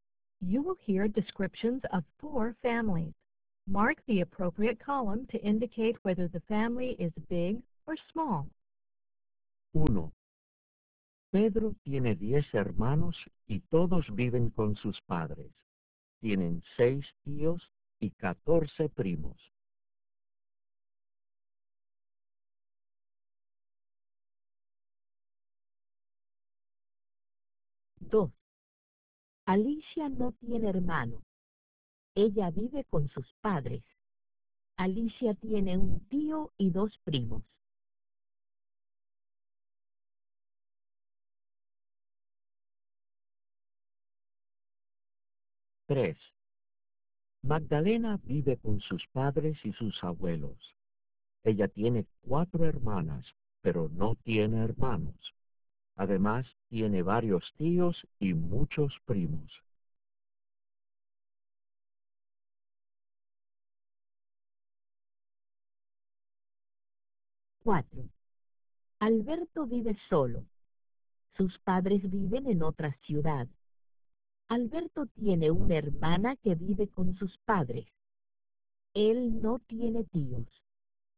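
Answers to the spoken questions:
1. big
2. small
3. big
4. small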